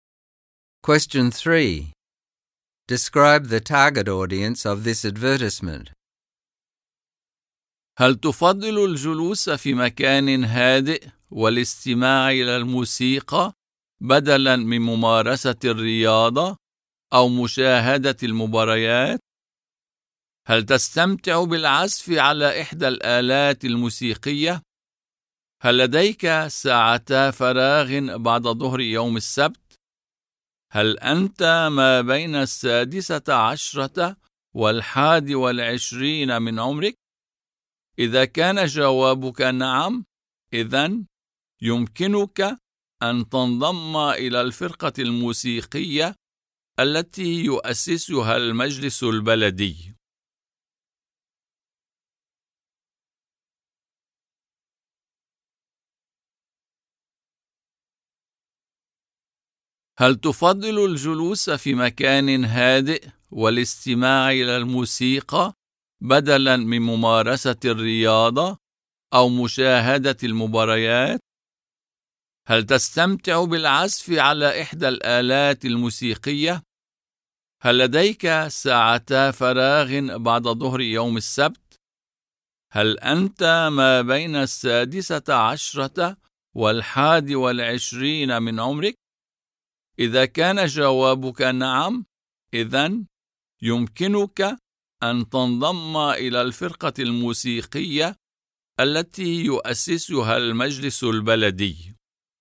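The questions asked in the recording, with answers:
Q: Describe the target audience of this advertisement.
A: People aged 16 to 21 who would rather listen to music quietly than play or watch sport, enjoy playing an instrument, and are free on Saturday afternoons.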